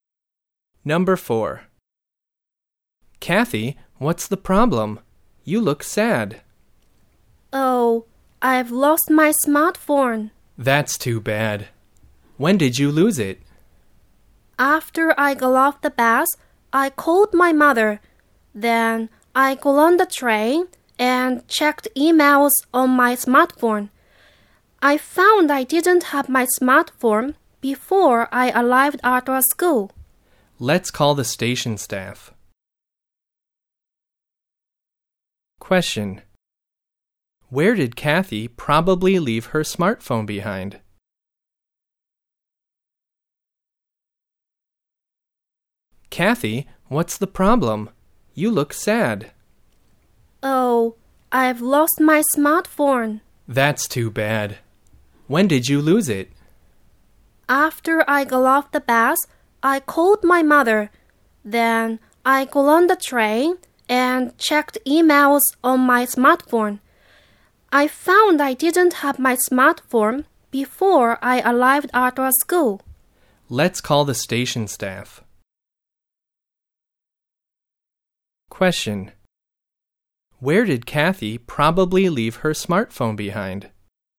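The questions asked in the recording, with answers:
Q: Where did Kathy probably leave her smartphone behind?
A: On the train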